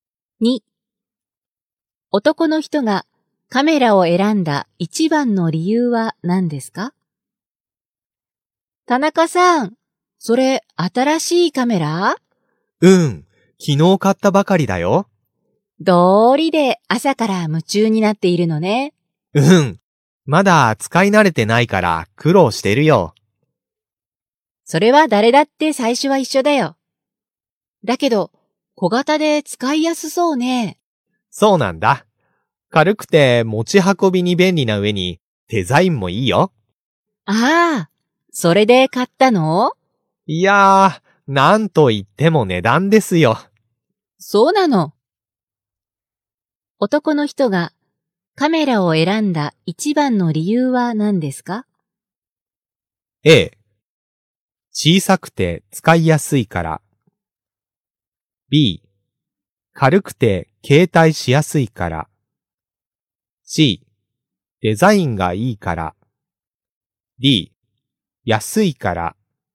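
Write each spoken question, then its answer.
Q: 男の人がカメラを選んだ一番の理由は何ですか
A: D: 安いから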